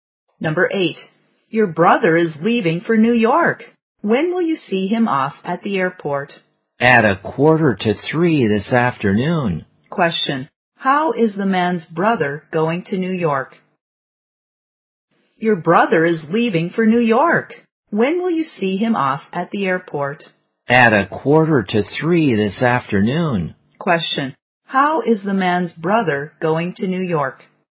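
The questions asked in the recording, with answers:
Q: Question, how is the man's brother going to New York?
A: By plane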